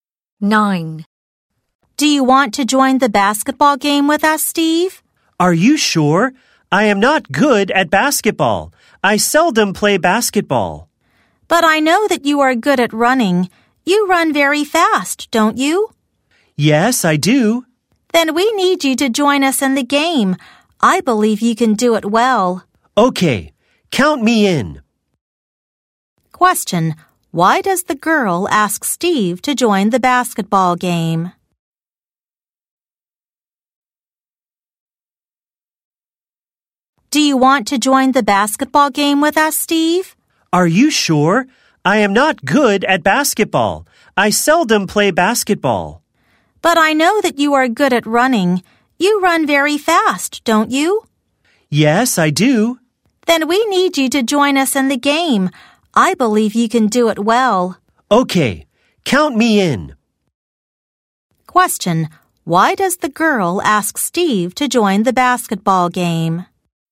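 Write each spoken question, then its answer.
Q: Why does the girl ask Steve to join the basketball game?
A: Because he runs very fast.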